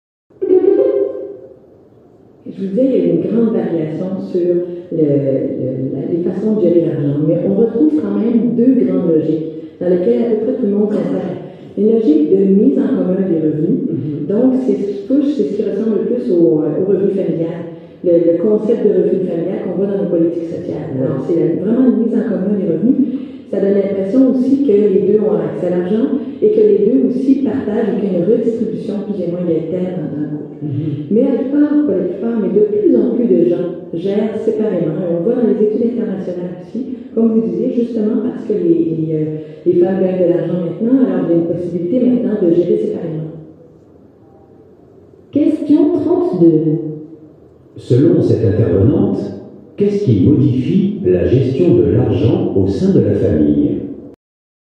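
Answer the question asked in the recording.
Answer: Le fait que les femmes gagnent maintenant de l'argent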